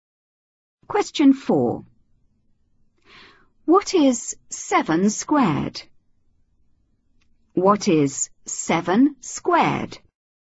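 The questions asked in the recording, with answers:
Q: What is 7 squared?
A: 49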